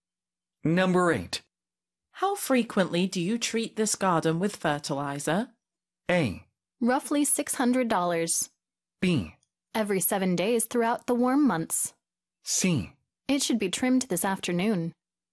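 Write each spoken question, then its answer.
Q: How frequently do you treat this garden with fertilizer?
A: B: Every 7 days throughout the warm months.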